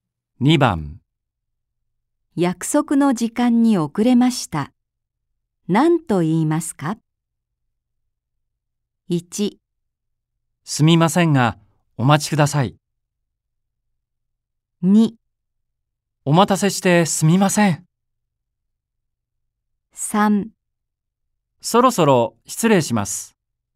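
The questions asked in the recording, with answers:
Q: 約束の時間に遅れました。何と言いますか ?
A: 2: お待たせしてすみません。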